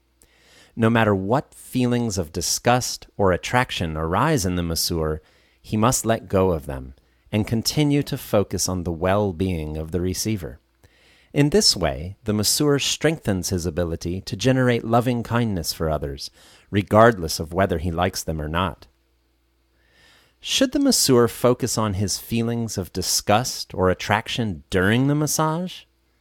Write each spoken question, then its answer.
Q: Should the masseur focus on his feelings of disgust or attraction during the massage?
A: No. The giver should focus on the well-being of the receiver.